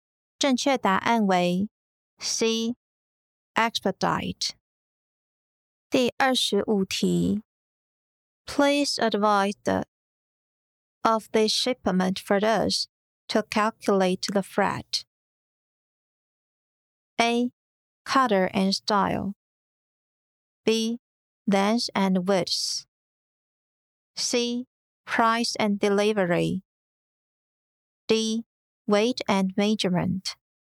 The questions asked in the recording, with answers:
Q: Please advise the of this shipment for us to calculate the freight.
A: 正确答案为 D. Weight and measurement.